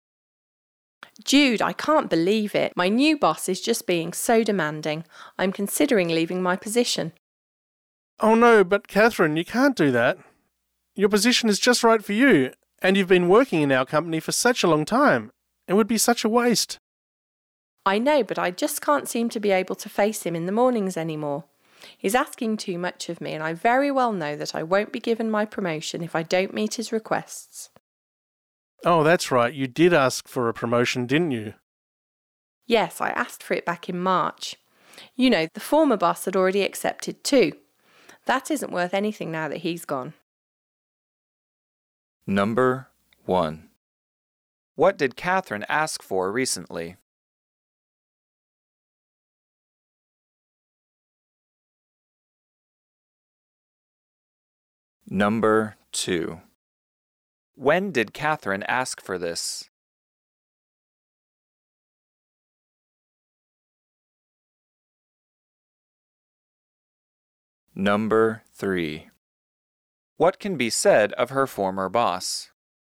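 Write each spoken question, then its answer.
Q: What did Catherine ask for recently?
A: A promotion

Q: When did Catherine ask for this?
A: In March

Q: What can be said of her former boss?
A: He had already accepted her promotion request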